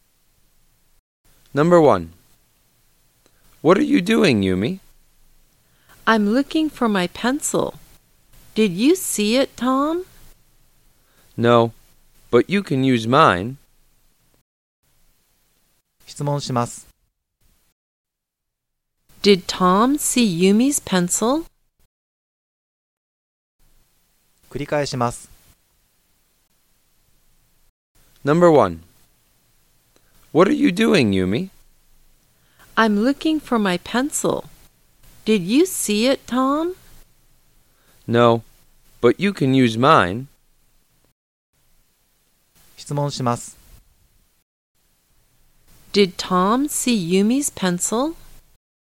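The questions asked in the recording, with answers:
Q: Did Tom see Yumi's pencil?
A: No, he didn't.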